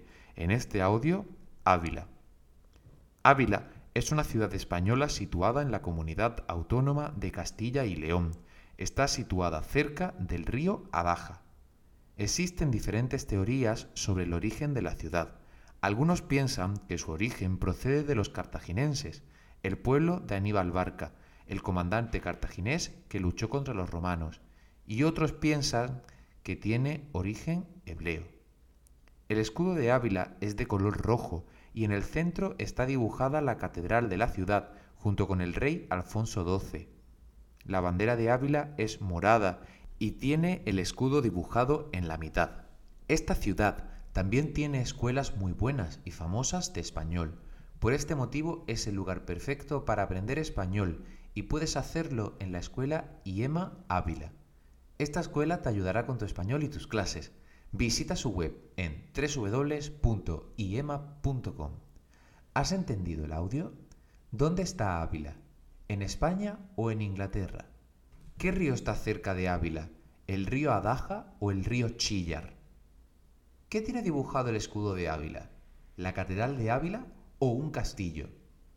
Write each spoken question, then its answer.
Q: ¿Dónde está Ávila? ¿En España o en Inglaterra?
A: España

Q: ¿Qué río está cerca de Ávila? ¿El río Adaja o el río Chillar?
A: el río Adaja